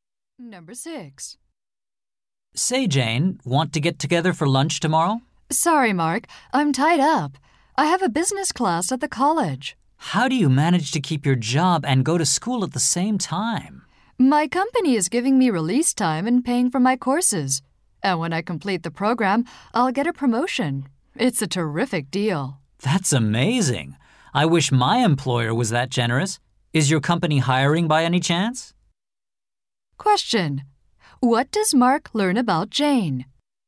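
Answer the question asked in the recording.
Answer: Her company pays for her business courses and gives her time off to study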